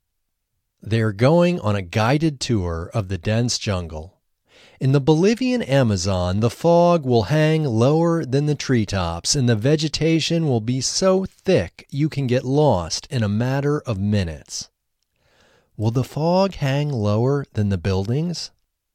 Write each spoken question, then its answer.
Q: Will the fog hang lower than the buildings?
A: No, the fog won't hang lower than the buildings.